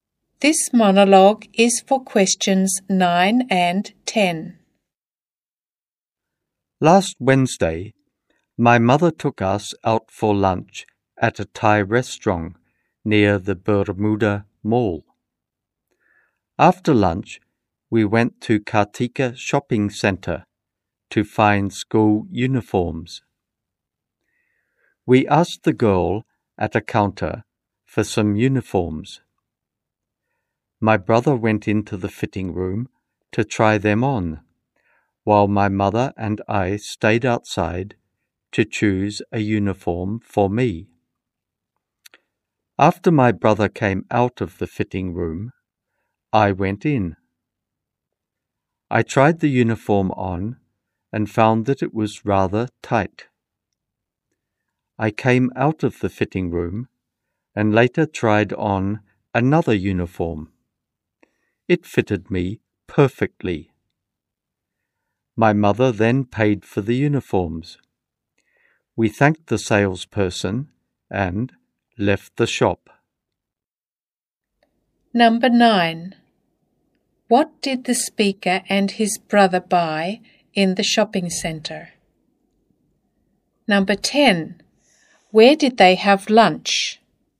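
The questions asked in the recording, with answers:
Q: What did the speaker and his brother buy in the shopping centre?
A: School uniforms

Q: Where did they have lunch?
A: At a Thai restaurant near the Bermuda Mall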